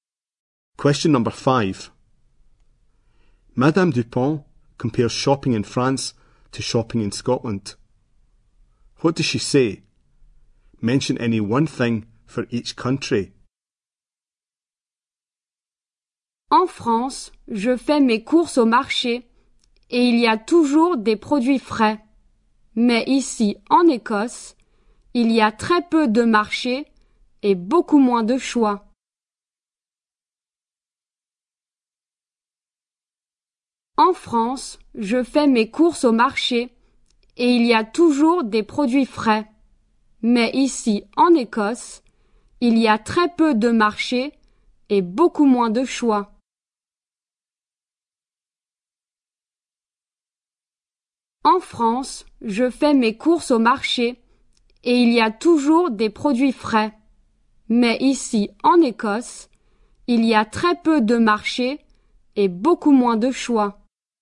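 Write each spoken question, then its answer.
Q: Madame Dupont compares shopping in France to shopping in Scotland.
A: France: she shops at the market, always fresh produce; Scotland: very few markets, much less choice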